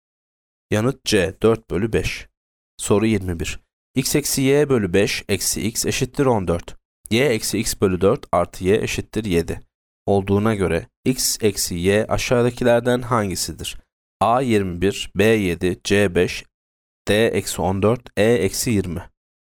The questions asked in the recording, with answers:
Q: Olduğuna göre x eksi y aşağıdakilerden hangisidir?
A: Yanıt E eksi 20.